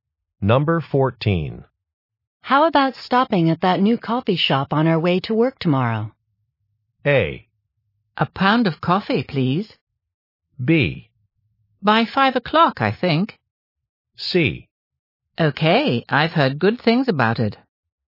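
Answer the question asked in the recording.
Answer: C: Okay, I've heard good things about it.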